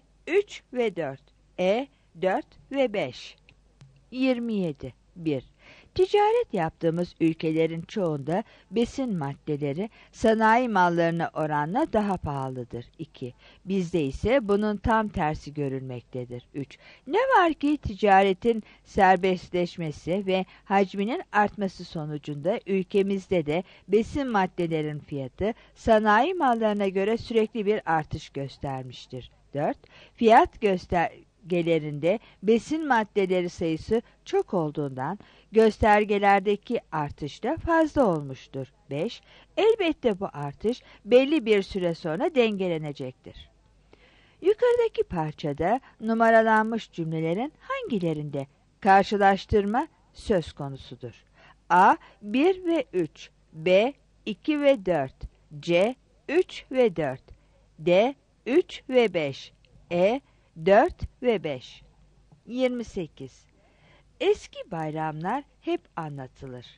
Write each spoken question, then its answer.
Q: Yukarıdaki parçada numaralanmış cümlelerin hangilerinde karşılaştırma söz konusudur?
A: 27 A